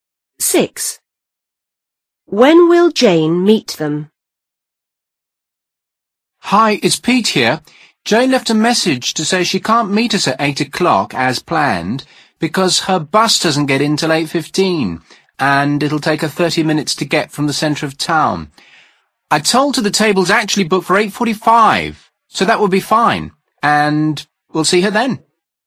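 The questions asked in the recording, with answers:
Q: When will Jane meet them?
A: At 8:45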